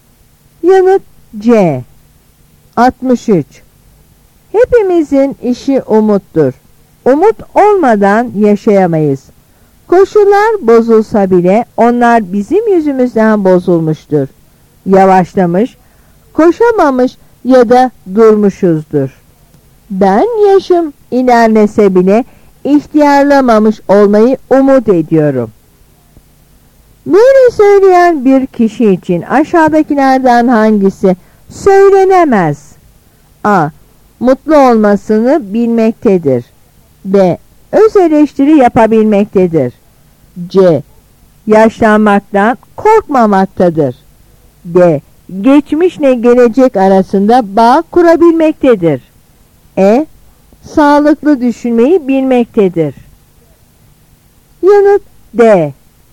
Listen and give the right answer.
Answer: Yanıt D.